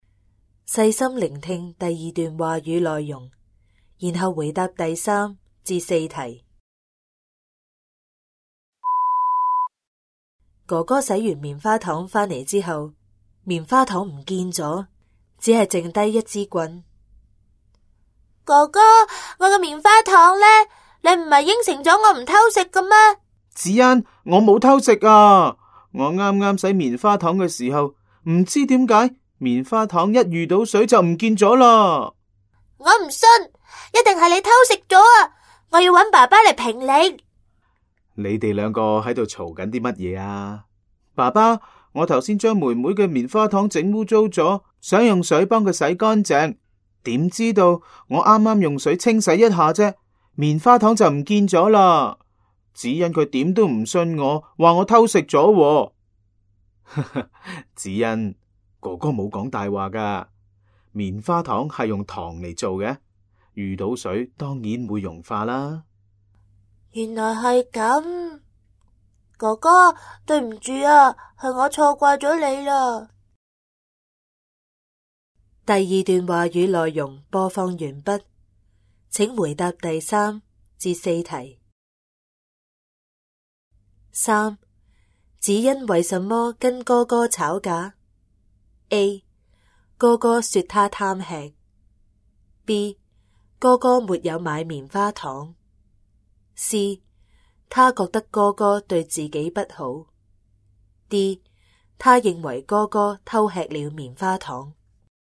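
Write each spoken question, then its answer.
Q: 子恩为什么跟哥哥吵架?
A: D: 他认为哥哥偷吃了棉花糖。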